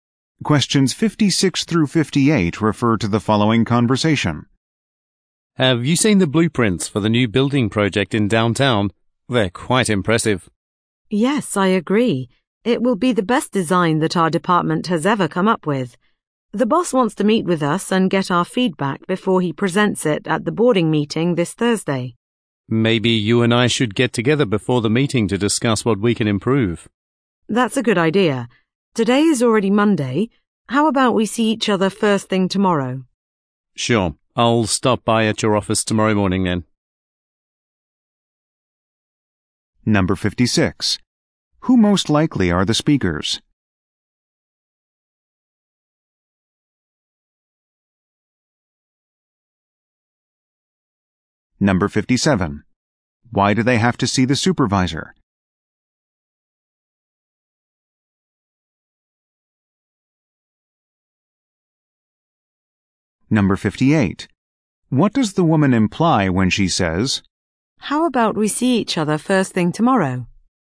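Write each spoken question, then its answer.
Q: Why do they have to see the supervisor?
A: To give feedback on the blueprints before the board meeting

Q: What does the woman imply when she says,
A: She wants to meet tomorrow morning to discuss improvements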